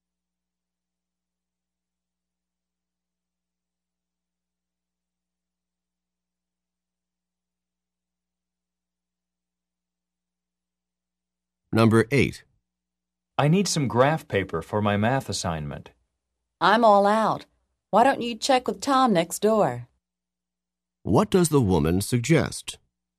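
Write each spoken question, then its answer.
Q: What does the woman suggest?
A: Asking Tom next door for graph paper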